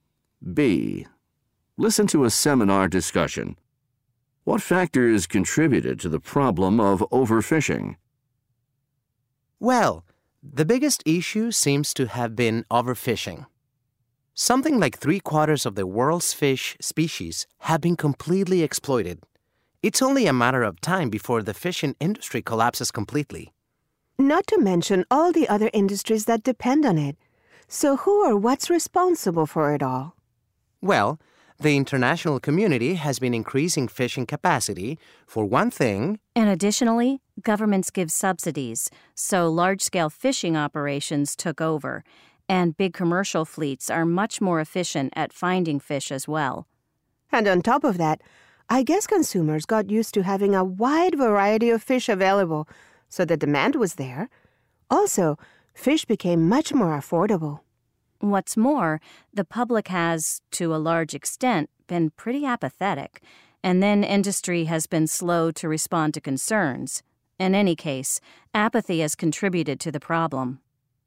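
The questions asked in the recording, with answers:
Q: What factors contributed to the problem of overfishing?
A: Increased international fishing capacity, government subsidies, efficient large commercial fleets, consumer demand for a variety of affordable fish, public apathy and slow industry response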